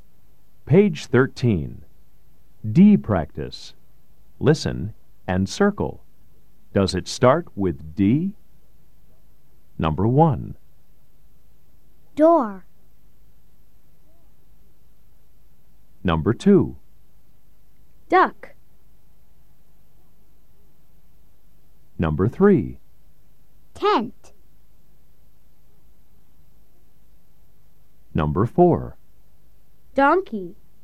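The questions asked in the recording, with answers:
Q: Does it start with D?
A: Yes (door)

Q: Does it start with D?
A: Yes (duck)

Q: Does it start with D?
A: No (tent)

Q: Does it start with D?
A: Yes (donkey)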